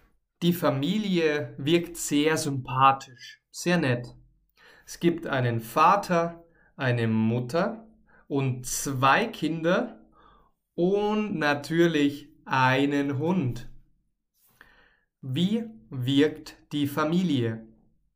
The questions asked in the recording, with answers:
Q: Wie wirkt die Familie?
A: Sympathisch. Die Familie wirkt sympathisch.